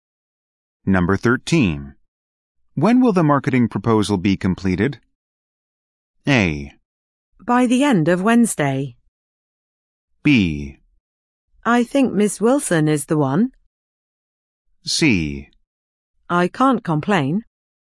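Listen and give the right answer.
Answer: A: By the end of Wednesday.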